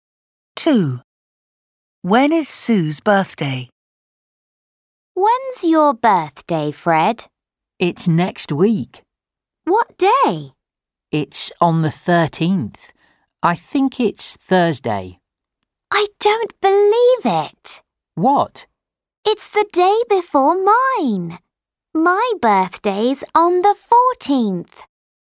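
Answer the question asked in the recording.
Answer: the 14th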